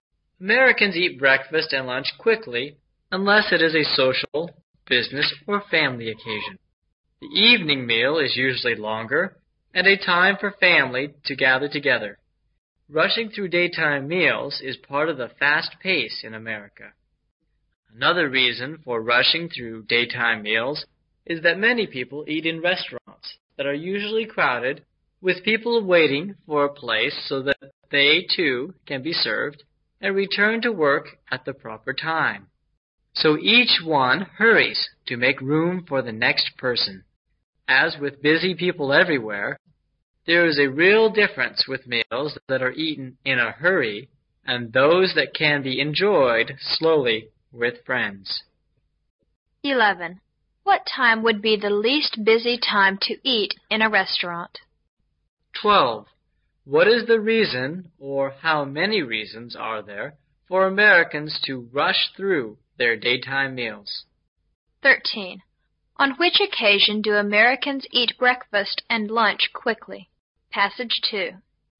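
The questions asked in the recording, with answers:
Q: What is the reason, or how many reasons are there, for Americans to rush through their daytime meals?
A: Two: the fast pace of American life and crowded restaurants

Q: On which occasion do Americans eat breakfast and lunch quickly?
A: When it is not a social, business or family occasion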